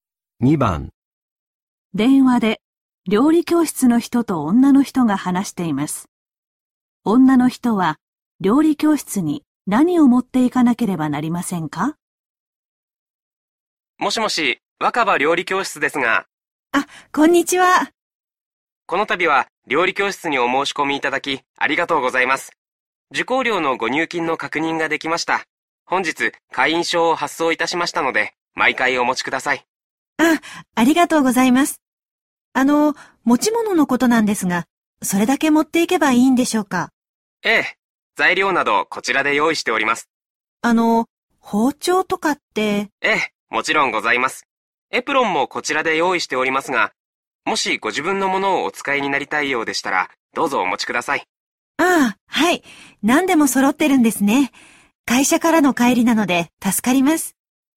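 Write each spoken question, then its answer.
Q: 女の人は料理教室に何を持っていかなければなりませんか?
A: 会員証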